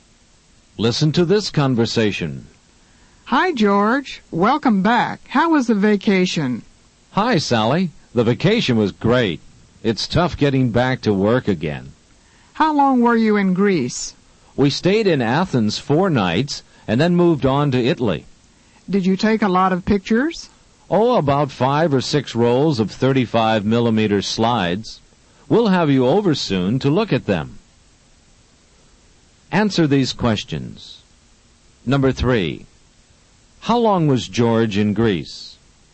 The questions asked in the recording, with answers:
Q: How long was George in Greece?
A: The answer to number 3 is C, 4 nights.